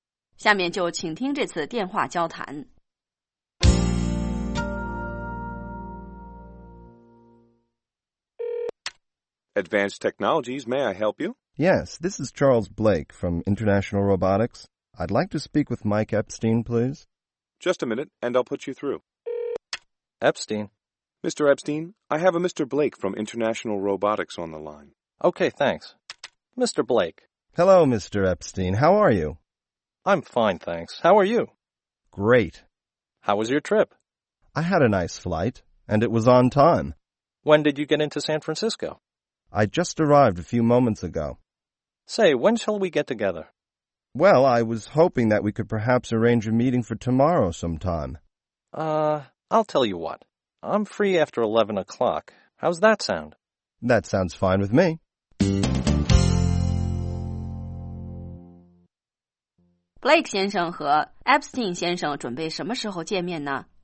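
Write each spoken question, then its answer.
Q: Blake 先生和 Epstein 先生准备什么时候见面呢?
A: 明天11点以后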